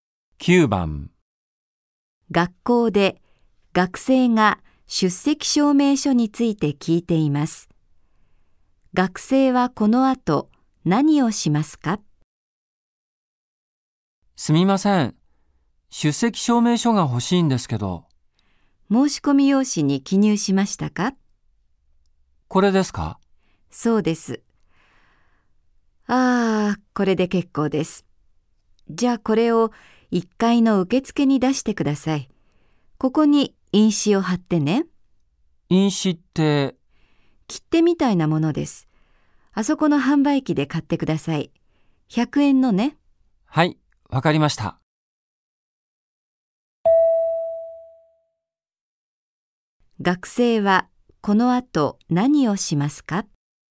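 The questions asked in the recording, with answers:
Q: 学生はこの後何をしますか?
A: 販売機で100円の印紙を買う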